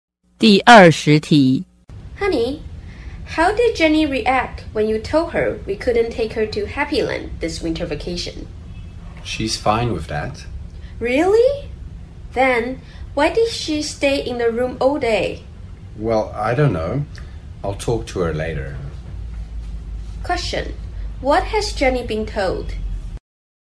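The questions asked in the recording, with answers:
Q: What has Jenny been told?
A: That they can't take her to Happyland this winter vacation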